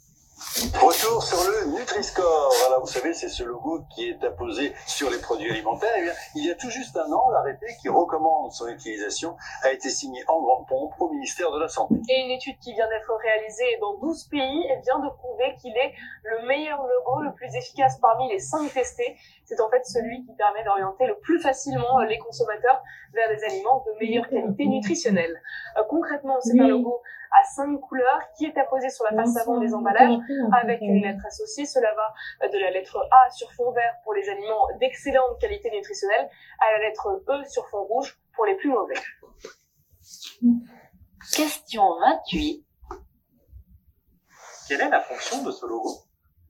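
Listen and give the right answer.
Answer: Orienter les consommateurs vers des aliments de meilleure qualité nutritionnelle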